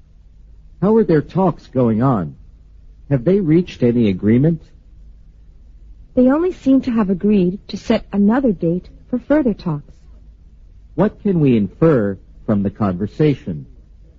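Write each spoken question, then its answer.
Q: What can we infer from the conversation?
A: The talks haven't reached a real agreement yet; they only agreed to meet again another day.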